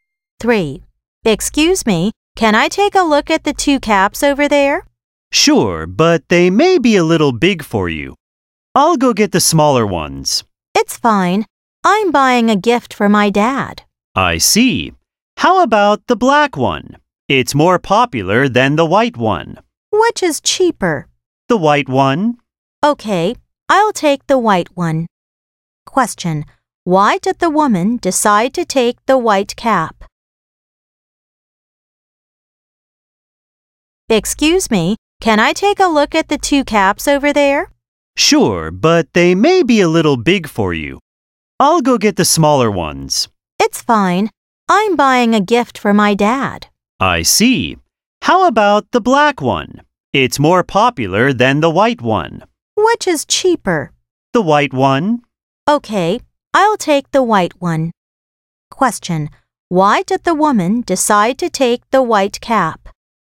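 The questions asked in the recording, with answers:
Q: Question. Why did the woman decide to take the white cap?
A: Because it is cheaper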